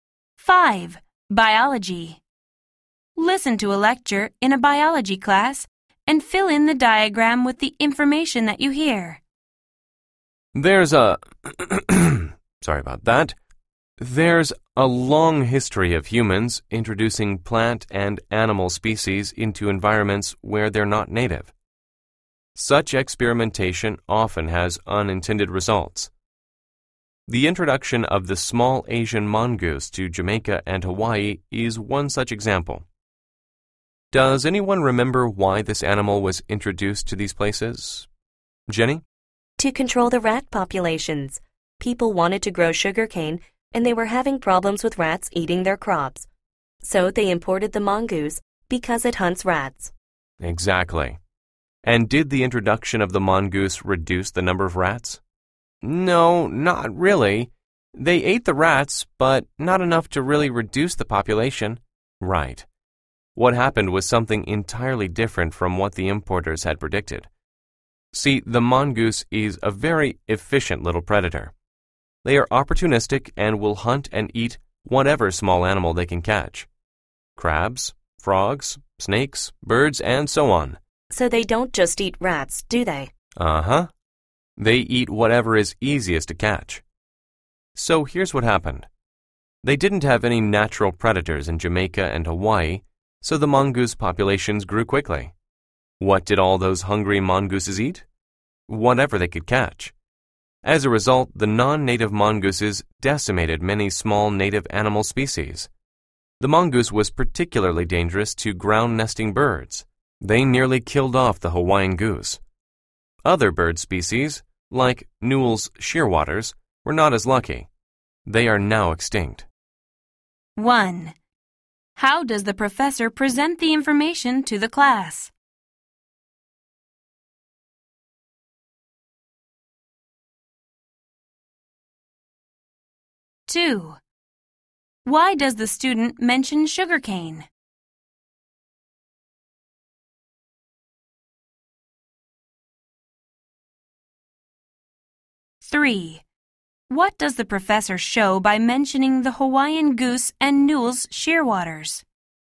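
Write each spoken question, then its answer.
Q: Why does the student mention sugarcane?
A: To explain why the mongoose was introduced: rats were eating the sugarcane crops

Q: What does the professor show by mentioning the Hawaiian goose and Newell's shearwaters?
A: That the mongoose badly harmed native ground-nesting birds, nearly wiping out one species and making another extinct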